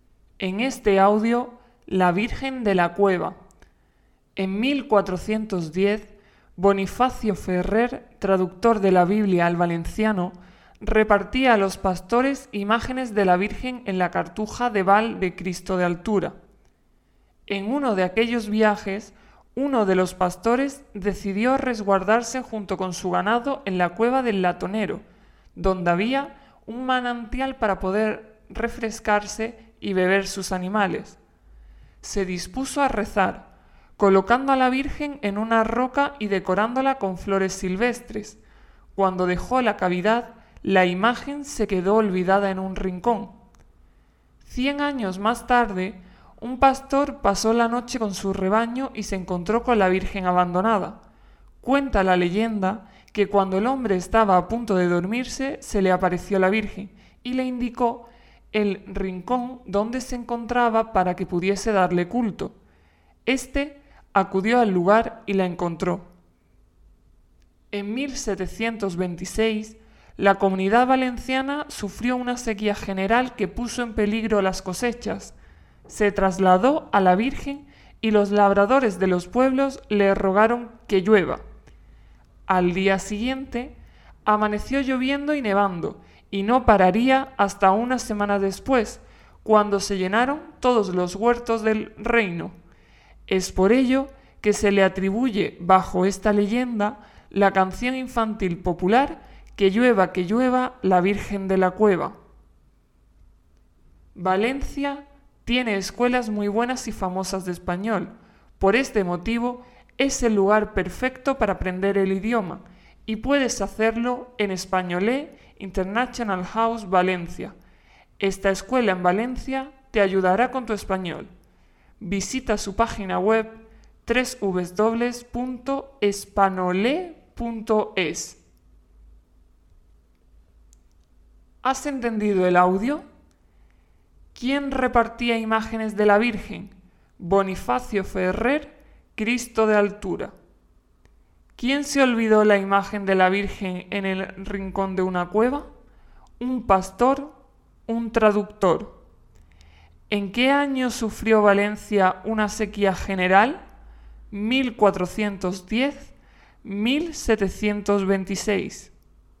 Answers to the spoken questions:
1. Bonifacio Ferrer
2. un pastor
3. 1726